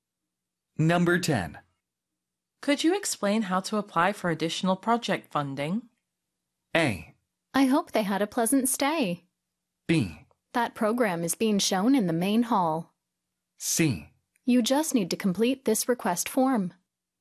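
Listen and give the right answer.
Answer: C: You just need to complete this request form.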